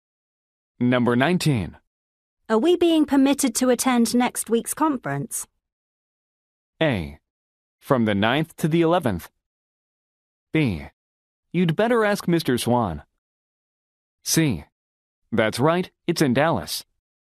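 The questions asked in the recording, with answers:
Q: Are we being permitted to attend next week's conference?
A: B: You'd better ask Mr. Swan.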